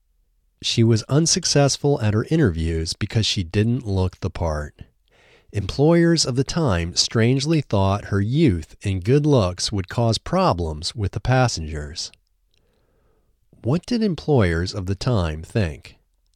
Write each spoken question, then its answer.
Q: What did employers of the time think?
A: Employers of the time strangely thought her youth and good looks would cause problems with the passengers.